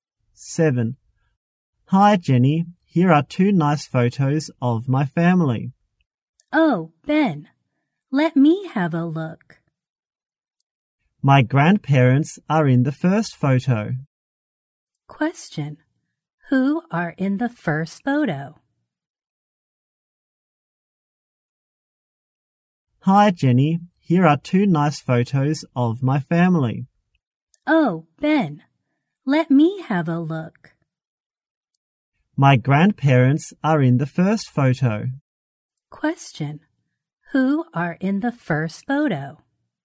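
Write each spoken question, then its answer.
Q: Who are in the first photo?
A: Ben's grandparents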